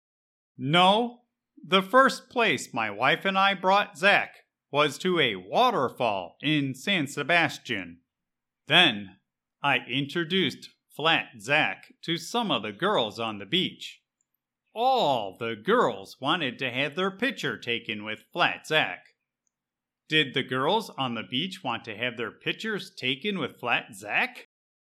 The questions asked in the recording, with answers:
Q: Did the girls on the beach want to have their pictures taken with Flat Zack?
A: Yep. Every girl on the beach wanted to have their picture taken with Flat Zack, and Zack did not seem to mind at all.